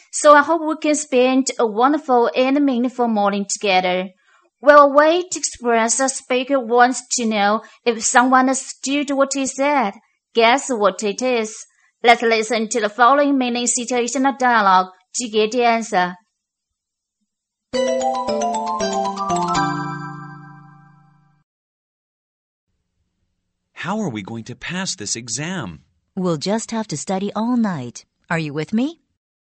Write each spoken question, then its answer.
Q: Guess what it is?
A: It is. Are you with me?